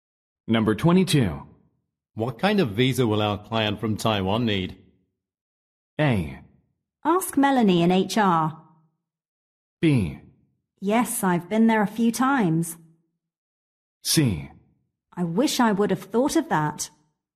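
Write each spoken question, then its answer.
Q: What kind of visa will our client from Taiwan need?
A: A: Ask Melanie in HR.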